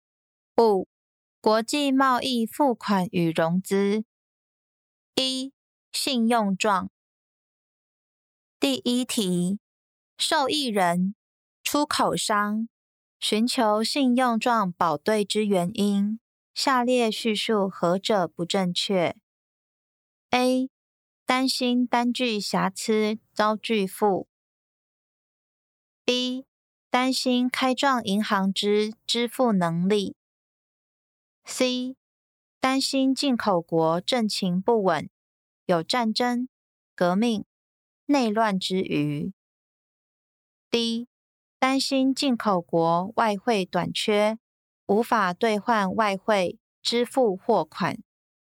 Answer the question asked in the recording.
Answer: 正确答案为 A. 担心单据瑕疵遭拒付。